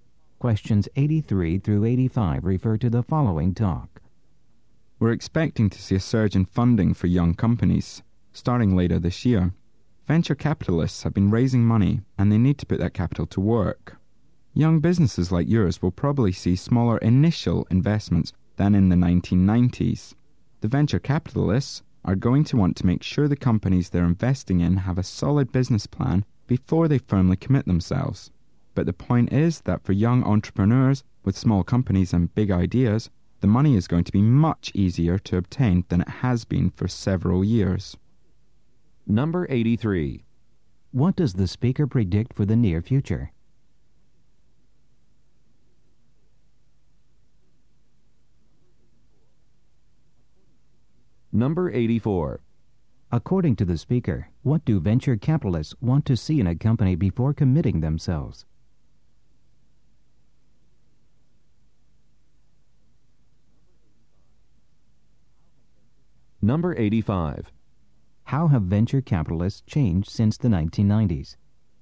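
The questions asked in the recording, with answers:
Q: What does the speaker predict for the near future?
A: A surge in funding for young companies

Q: According to the speaker, what do venture capitalists want to see in a company before committing themselves?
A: A solid business plan

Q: How have venture capitalists changed since the 1990s?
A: They make smaller initial investments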